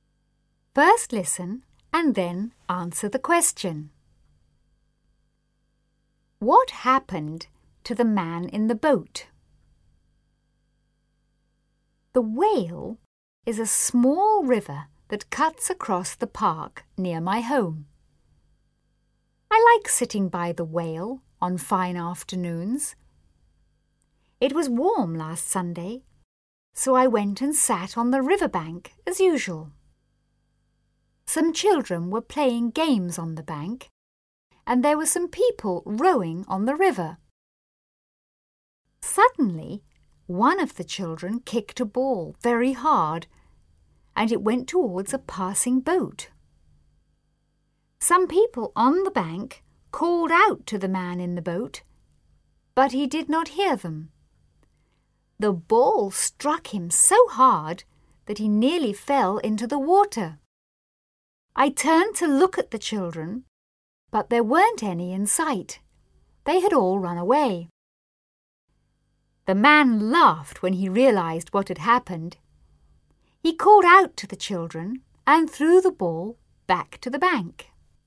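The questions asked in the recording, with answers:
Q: What happened to the man in the boat?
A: A ball kicked by a child struck him so hard that he nearly fell into the water.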